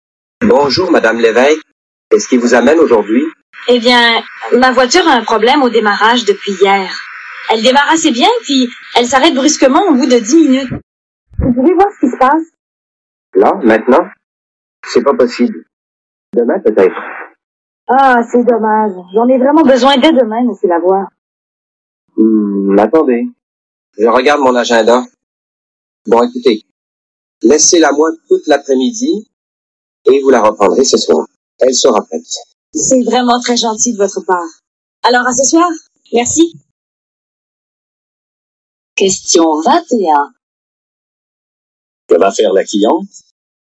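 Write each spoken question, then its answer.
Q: Que va faire la cliente?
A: Laisser sa voiture au garage tout l'après-midi et la reprendre ce soir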